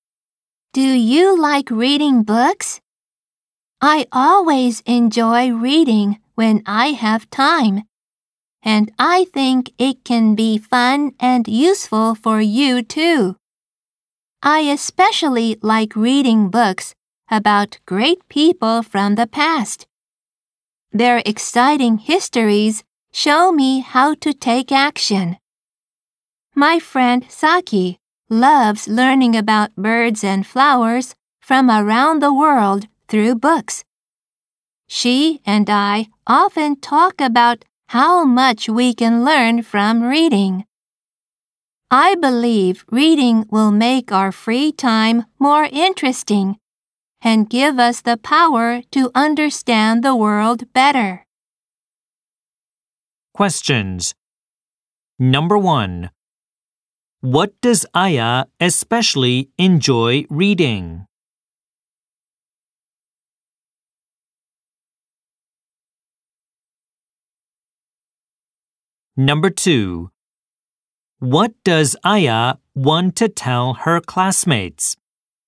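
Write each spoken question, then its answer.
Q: What does Aya especially enjoy reading?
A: Books about great people from the past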